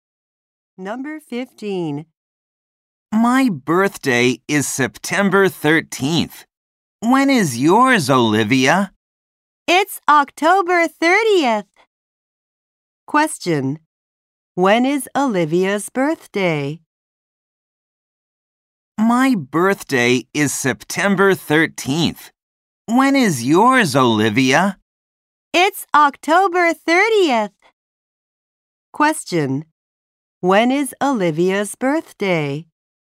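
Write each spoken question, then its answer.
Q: When is Olivia's birthday?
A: October 30th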